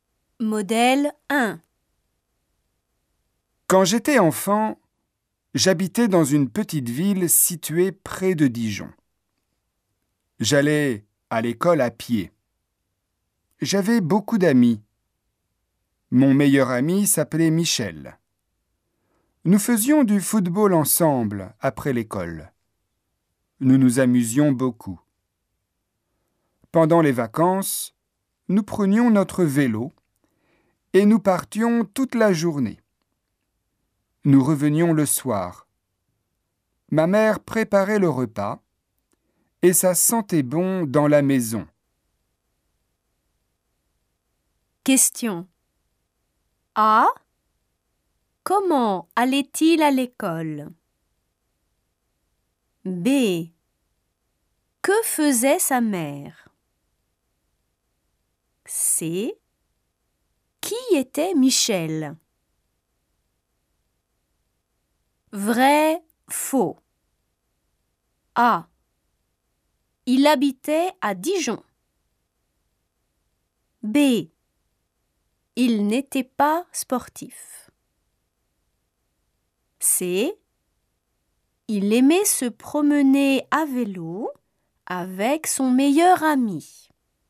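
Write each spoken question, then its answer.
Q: Comment allait-il à l'école?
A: À pied

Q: Que faisait sa mère?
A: Elle préparait le repas

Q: Qui était Michel?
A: Son meilleur ami

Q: Il habitait à Dijon.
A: Faux (dans une petite ville près de Dijon)

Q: Il n'était pas sportif.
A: Faux

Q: Il aimait se promener à vélo avec son meilleur ami.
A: Vrai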